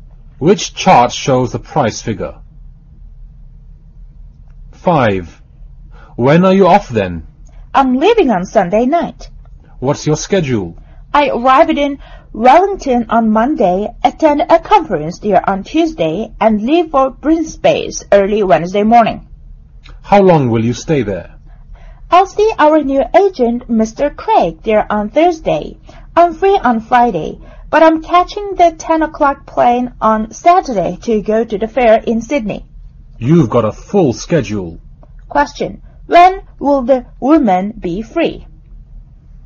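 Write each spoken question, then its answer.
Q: When will the woman be free?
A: On Friday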